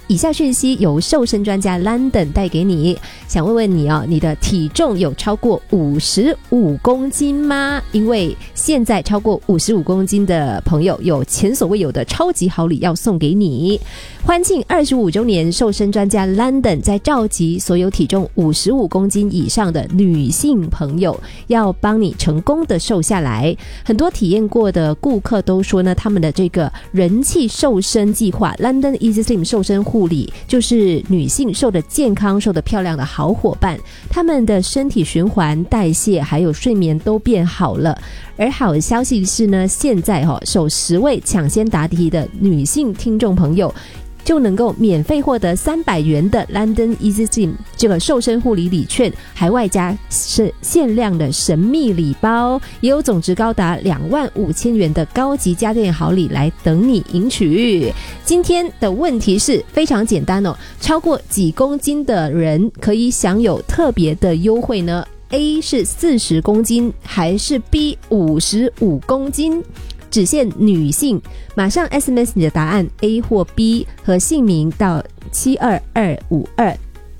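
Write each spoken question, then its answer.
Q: 今天的问题是非常简单哦,超过几公斤的人可以享有特别的优惠呢?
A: B: 55公斤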